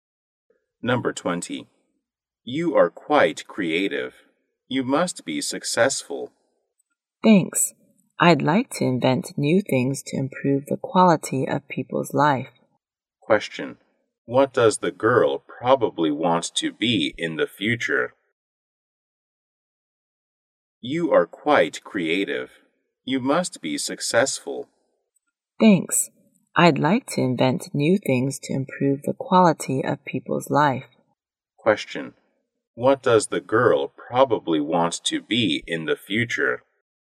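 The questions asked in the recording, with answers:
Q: What does the girl probably want to be in the future?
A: An inventor.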